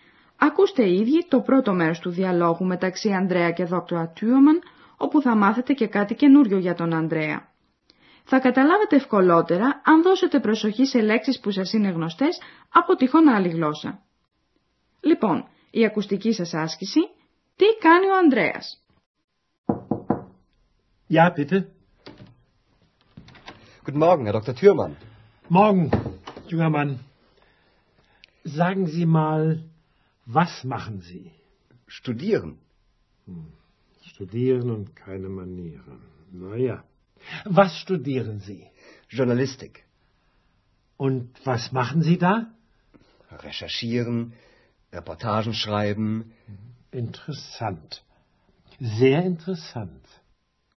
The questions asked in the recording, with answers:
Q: Λοιπόν, η ακουστική σας άσκηση, τι κάνει ο Ανδρέας.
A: Καταλάβατε από ακούσατε πως ο Ανδρέας σπουδάζει δημοσιογραφία.